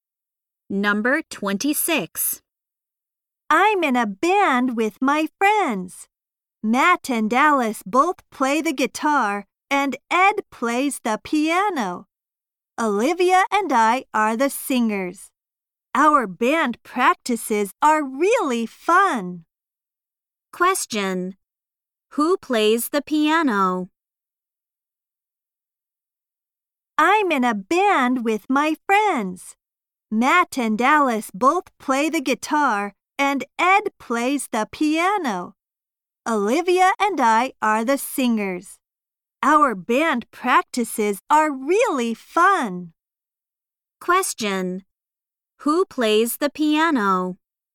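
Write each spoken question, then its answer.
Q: Who plays the piano?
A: Ed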